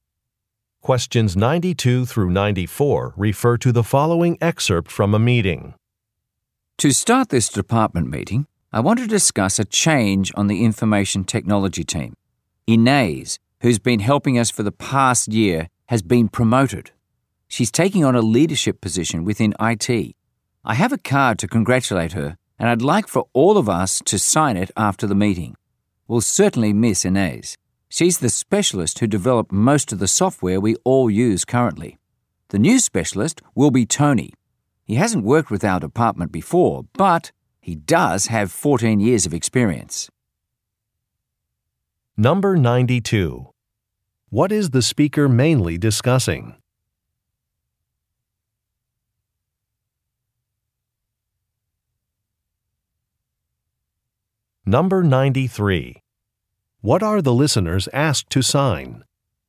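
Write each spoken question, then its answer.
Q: What are the listeners asked to sign?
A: A congratulations card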